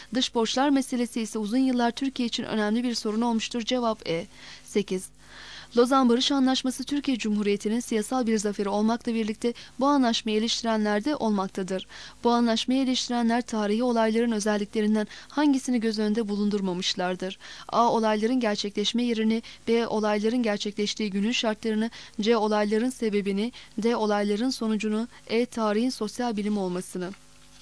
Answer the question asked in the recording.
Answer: Cevap B.